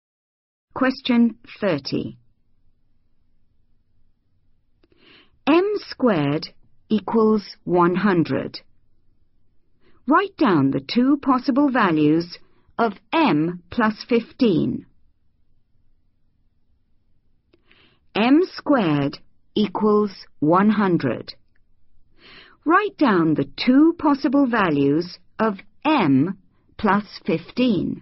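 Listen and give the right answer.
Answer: 25 and 5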